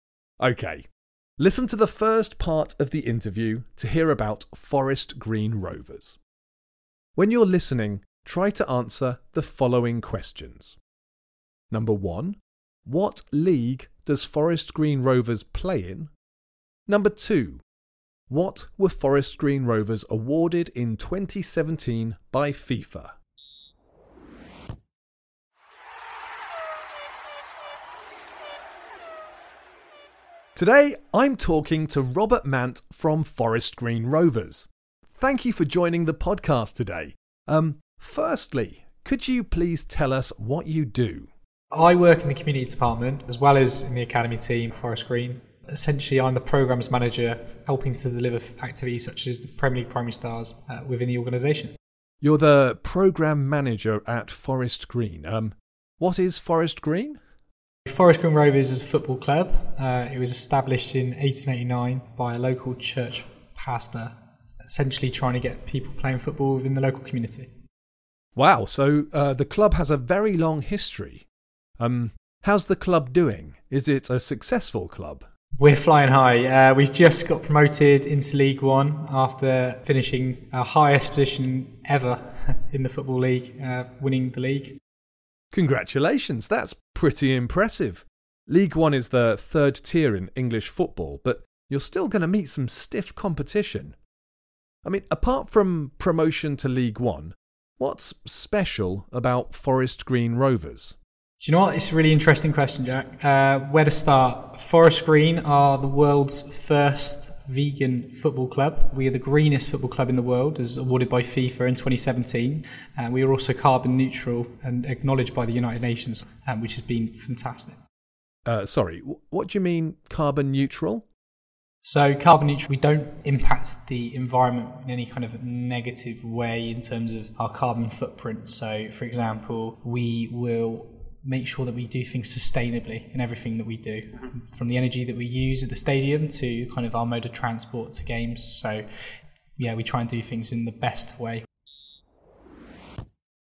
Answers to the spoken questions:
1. And the answer is League One, after winning promotion by winning League Two.
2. And the answer is, Forest Green Rovers were awarded the title of Greenest Football Club by FIFA in 2017.